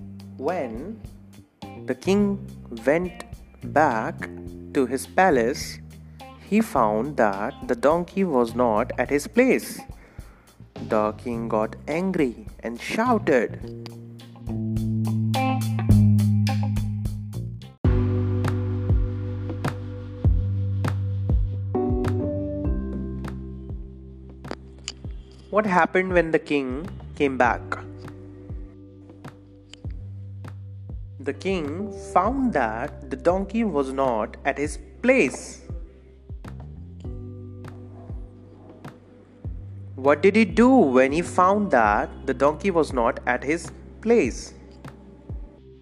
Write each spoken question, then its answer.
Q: What happened when the king came back?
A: The king found that the donkey was not at his place.

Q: What did he do when he found that the donkey was not at his place?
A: The king shouted when he found that the donkey was not at his place.